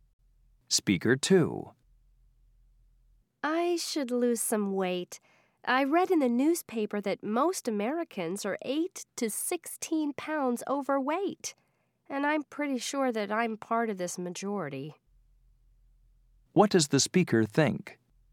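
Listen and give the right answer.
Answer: That he is overweight, like most Americans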